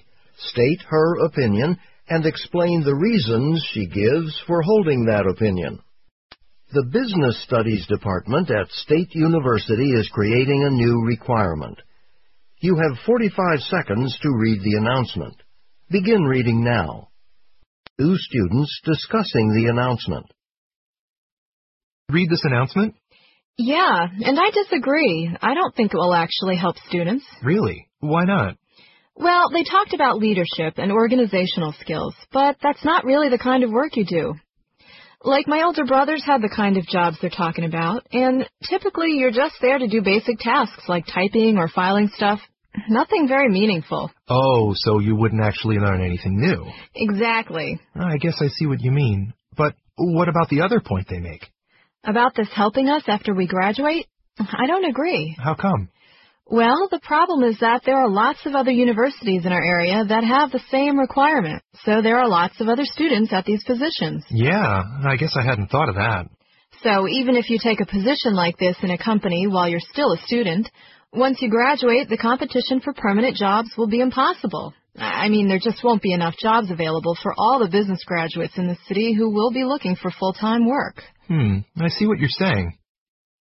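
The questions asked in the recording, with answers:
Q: The woman expresses her opinion of the university's new policy, state her opinion, and explain the reasons she gives for holding that opinion.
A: She disagrees with it: such jobs involve only basic tasks like typing or filing, so students learn nothing new, and it won't help after graduation because many students from other local universities have the same requirement, so there will be too much competition for full-time jobs.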